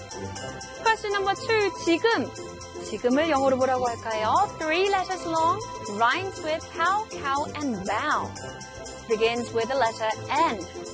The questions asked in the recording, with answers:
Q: 지금. 지금을 영어로 뭐라고 할까요?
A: 지금, 영어로 N-O-W, now.